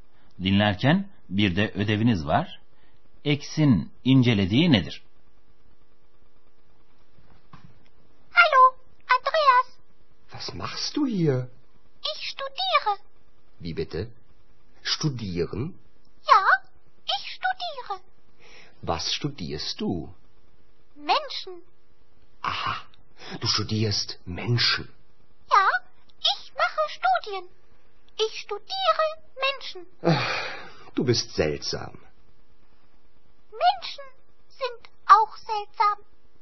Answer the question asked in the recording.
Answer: X insanları inceliyormuş.